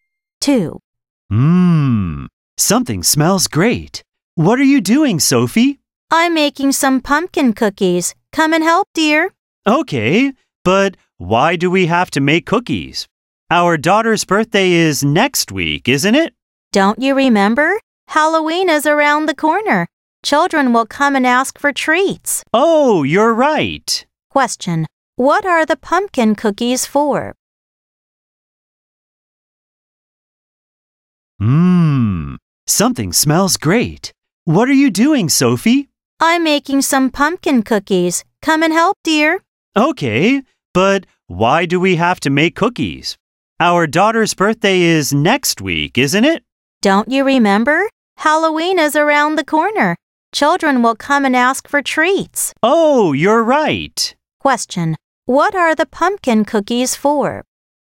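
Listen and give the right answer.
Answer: Halloween treats for children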